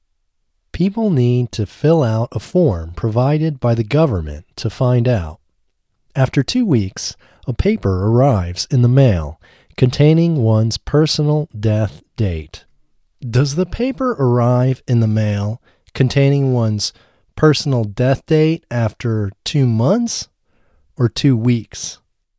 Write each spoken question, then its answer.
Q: Does the paper arrive in the mail containing one's personal death date after 2 months or 2 weeks?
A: The paper arrives in the mail containing one's personal death date after 2 weeks.